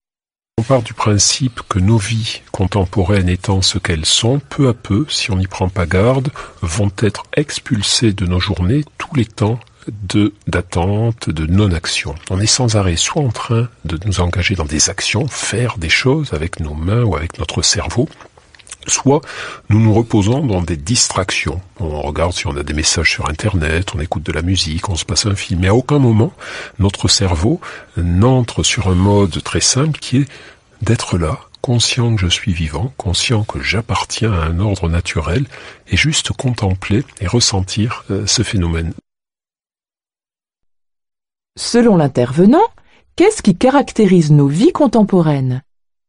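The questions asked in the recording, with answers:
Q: Selon l'intervenant, qu'est-ce qui caractérise nos vies contemporaines ?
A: On est sans arrêt dans l'action ou la distraction ; les temps d'attente et de non-action disparaissent de nos journées.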